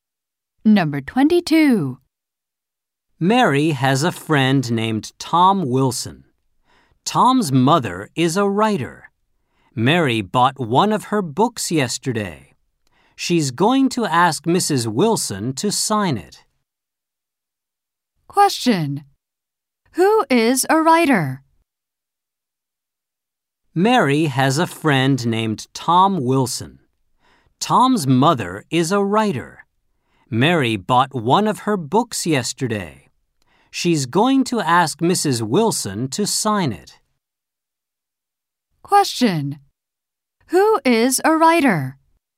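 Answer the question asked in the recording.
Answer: Tom's mother (Mrs. Wilson)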